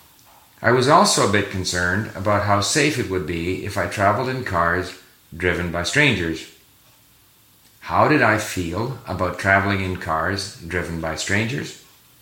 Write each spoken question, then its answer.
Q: How did I feel about traveling in cars driven by strangers?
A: I was a bit concerned about traveling in cars driven by strangers.